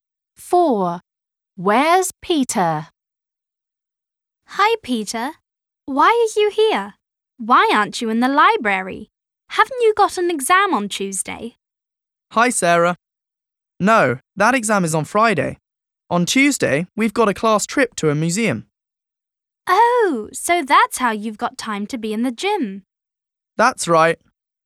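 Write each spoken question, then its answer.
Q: Where's Peter?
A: In the gym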